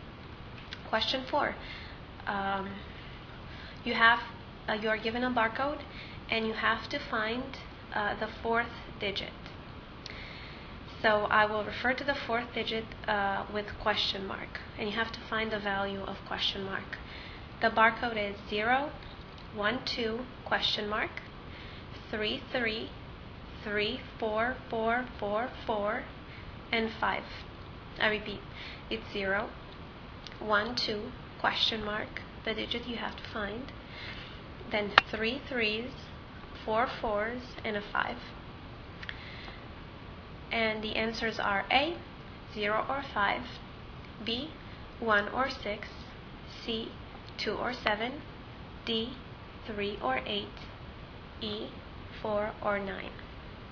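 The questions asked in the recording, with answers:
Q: You are given a barcode, and you have to find the fourth digit.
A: A: 0 or 5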